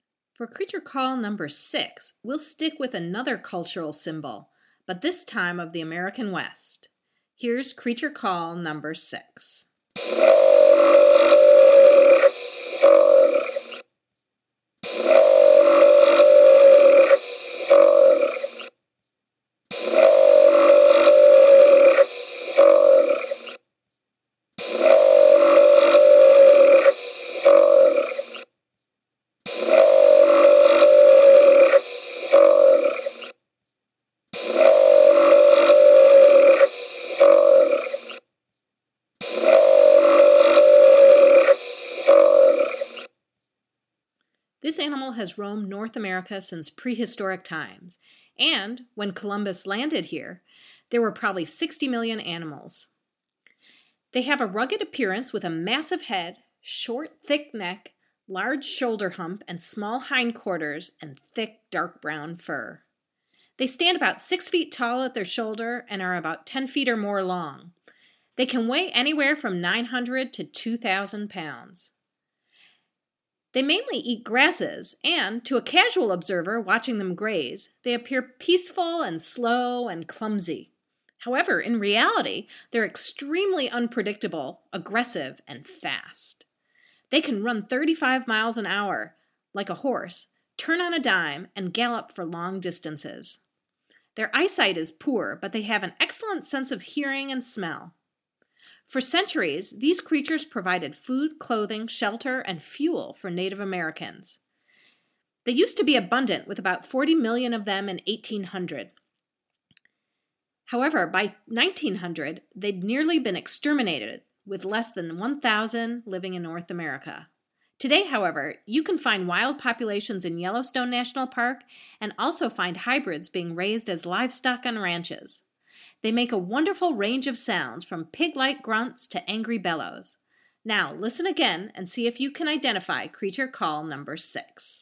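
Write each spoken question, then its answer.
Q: Now, listen again and see if you can identify creature call number 6.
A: American bison (buffalo)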